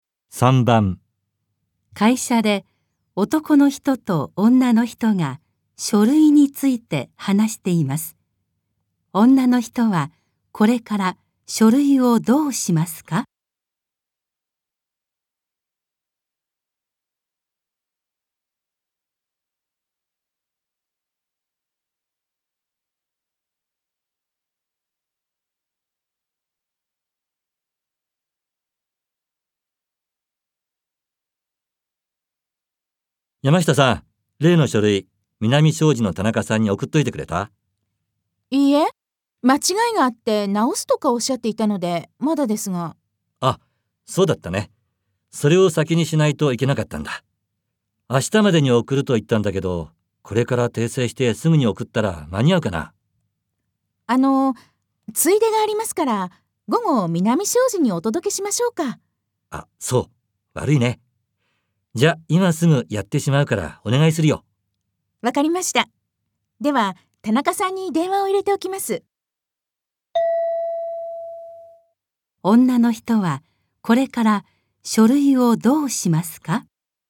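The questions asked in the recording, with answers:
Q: 女の人はこれから書類をどうしますか?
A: 男の人が訂正した後、午後に南障子の田中さんに直接届ける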